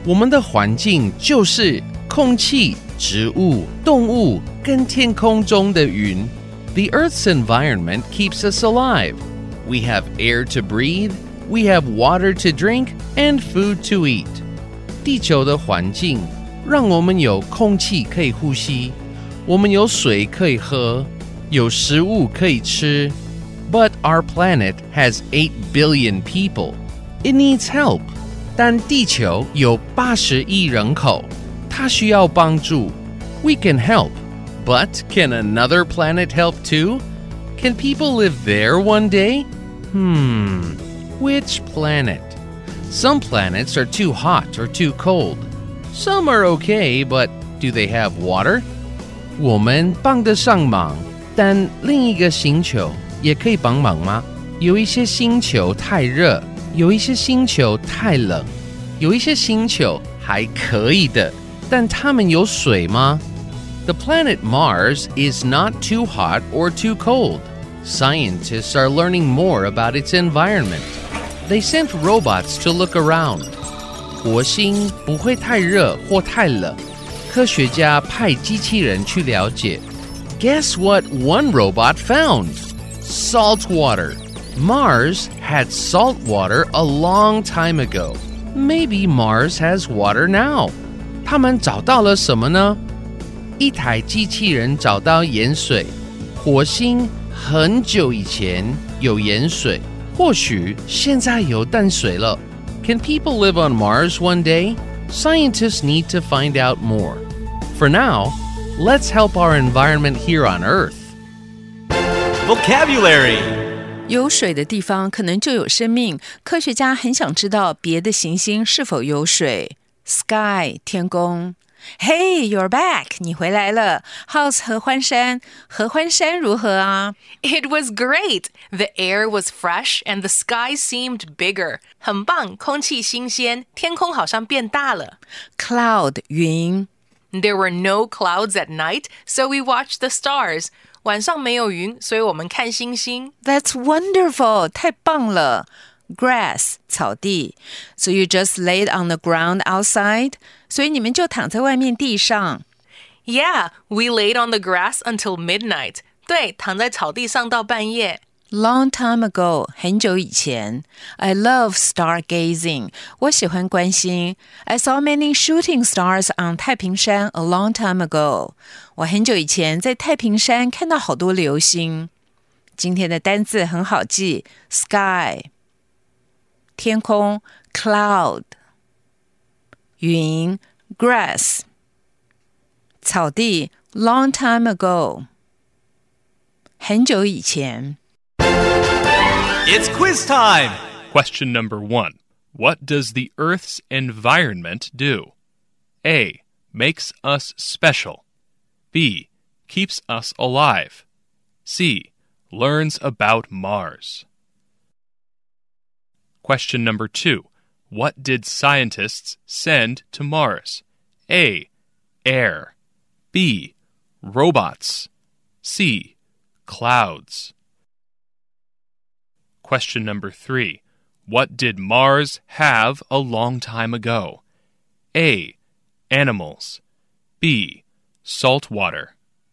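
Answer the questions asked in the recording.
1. B: Keeps us alive.
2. B: Robots.
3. B: Salt water.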